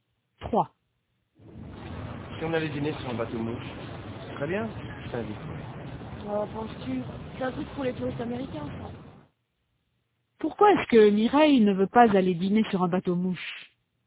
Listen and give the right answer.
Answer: Parce que c'est un truc pour les touristes américains.